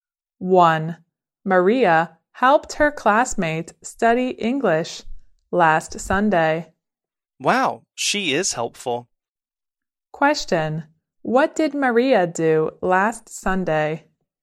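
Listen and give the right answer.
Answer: She helped her classmate study English.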